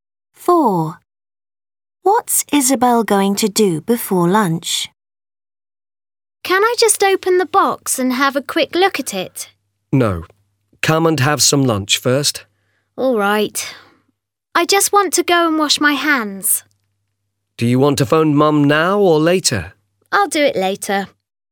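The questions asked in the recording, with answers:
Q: What's Isabel going to do before lunch?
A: wash her hands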